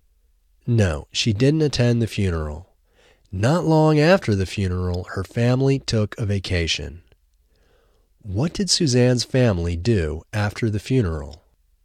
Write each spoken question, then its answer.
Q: What did Suzanne's family do after the funeral?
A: Her family took a vacation after the funeral.